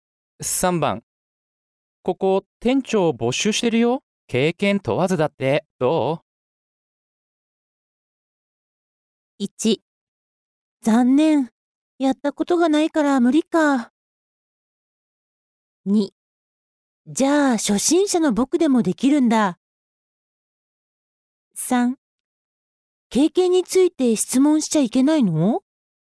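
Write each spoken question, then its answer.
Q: ここ店長募集してるよ、経験問わずだって、どう?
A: 2: じゃあ初心者の僕でもできるんだ。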